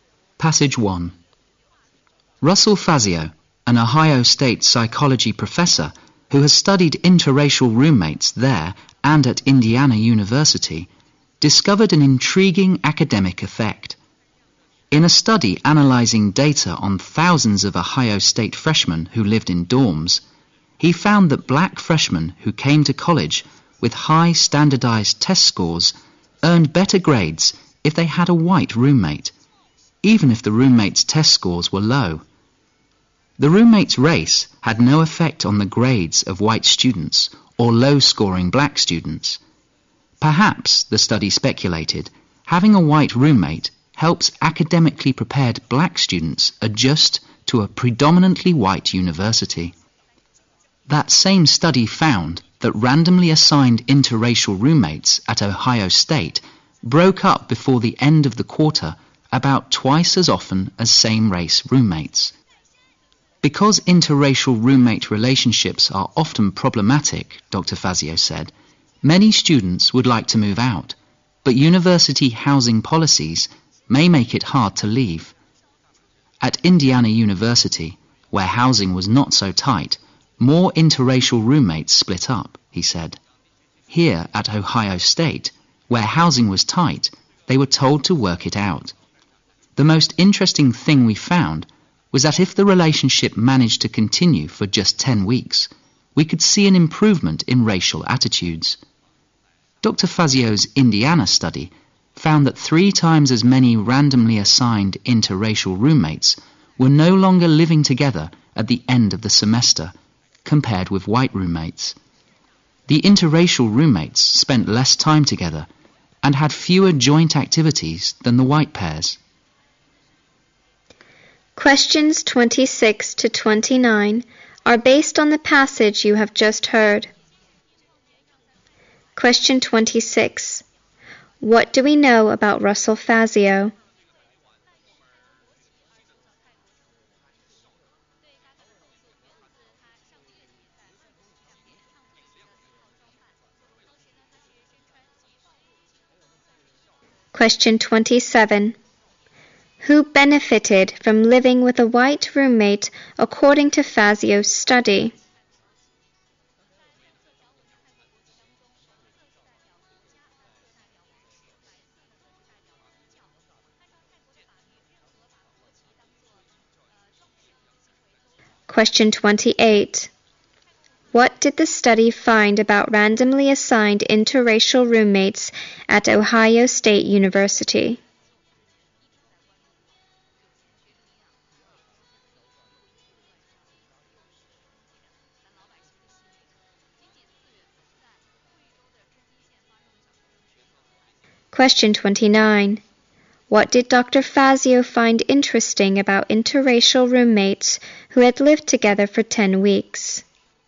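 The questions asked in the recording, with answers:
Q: What do we know about Russell Fazio?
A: He is an Ohio State psychology professor who studied interracial roommates

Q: Who benefited from living with a white roommate according to Fazio's study?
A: Black freshmen with high test scores

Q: What did the study find about randomly assigned interracial roommates at Ohio State University?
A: They broke up about twice as often as same-race roommates

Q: Fazio find interesting about interracial roommates who had lived together for 10 weeks?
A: Their racial attitudes improved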